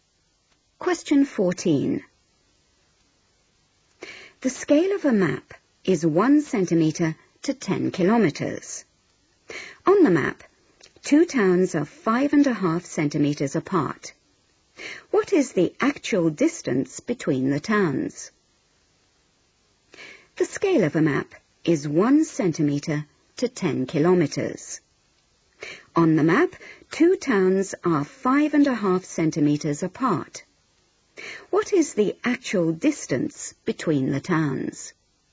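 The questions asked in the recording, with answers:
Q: What is the actual distance between the towns?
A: 55 km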